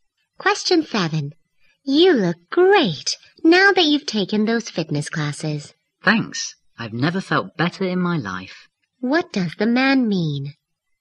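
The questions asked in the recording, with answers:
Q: What does the man mean?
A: He has never felt better, thanks to the fitness classes.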